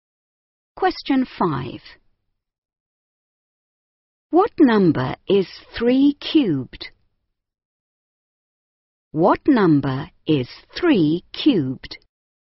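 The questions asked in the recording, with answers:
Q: What number is 3 cubed?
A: 27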